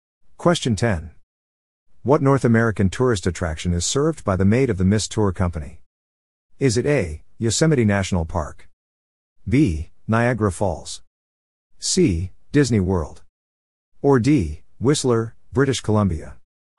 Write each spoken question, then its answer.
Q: What North American tourist attraction is served by the maid of the Mist Tour Company?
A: The answer is B. Niagara Falls.